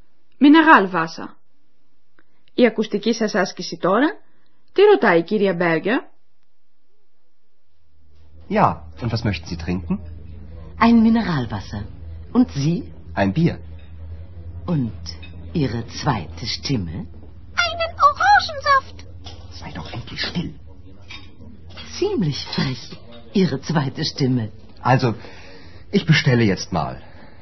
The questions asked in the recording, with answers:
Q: Τι ρωτάει η κυρία Μπέργκερ?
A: Και η δεύτερη φωνή σας?